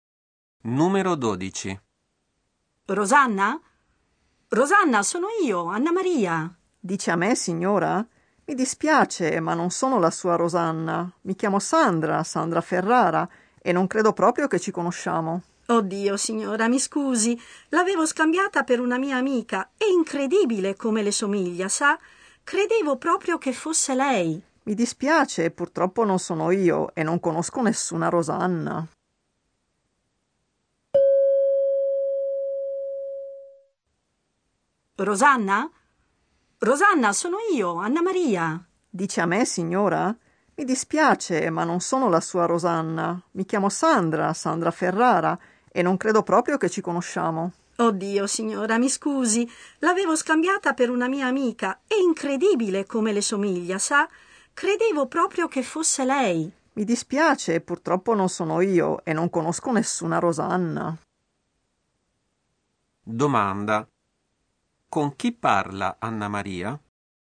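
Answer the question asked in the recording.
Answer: Con una sconosciuta, Sandra Ferrara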